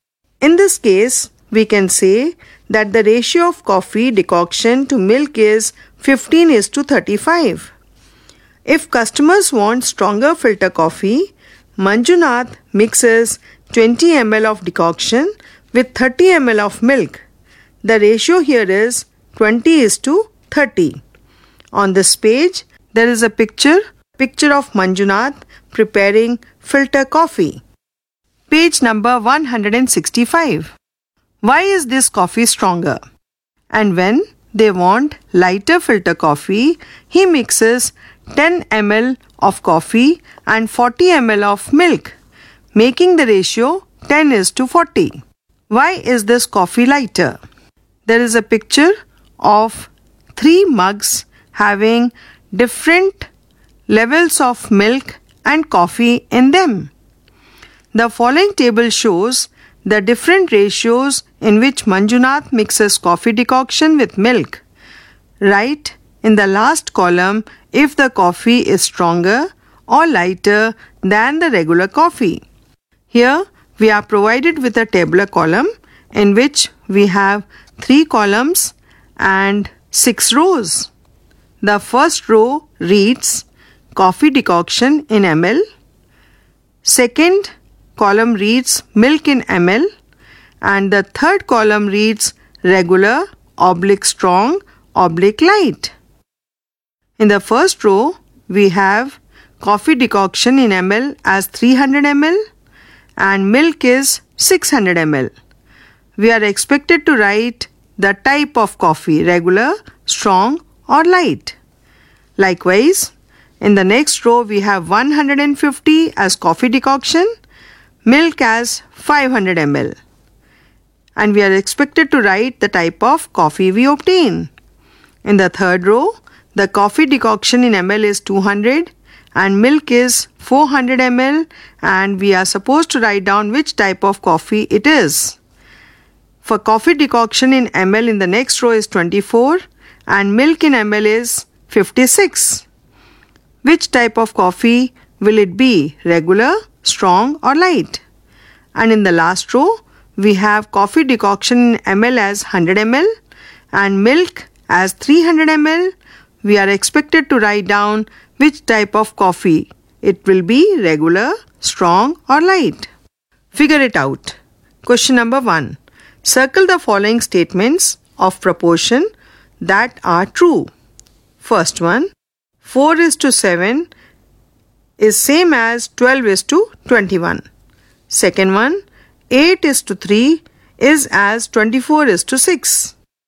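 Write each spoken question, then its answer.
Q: Why is this coffee stronger?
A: It has more decoction and less milk: 20:30 versus the regular 15:35

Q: Why is this coffee lighter?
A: It has less decoction and more milk: 10:40 versus the regular 15:35

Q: Which type of coffee will it be?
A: Regular (24:56 = 3:7, the same as 15:35)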